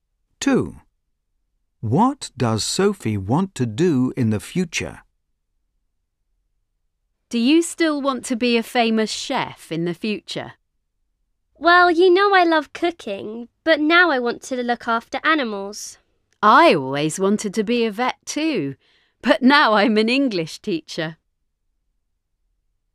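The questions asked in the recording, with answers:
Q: What does Sophie want to do in the future?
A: look after animals (be a vet)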